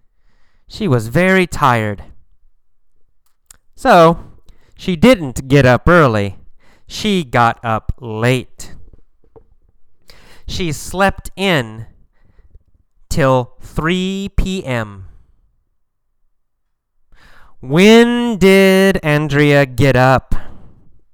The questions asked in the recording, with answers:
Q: When did Andrea get up?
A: She got up at 3 p.m.